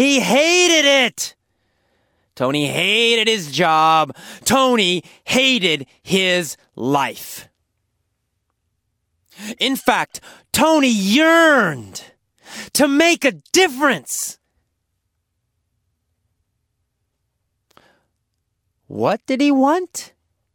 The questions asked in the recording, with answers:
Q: What did he want?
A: He wanted to make a difference.